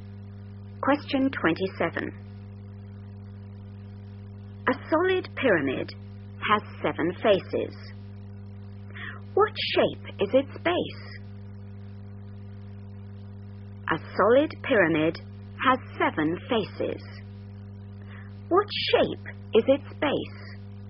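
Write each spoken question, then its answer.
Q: What shape is its base?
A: hexagon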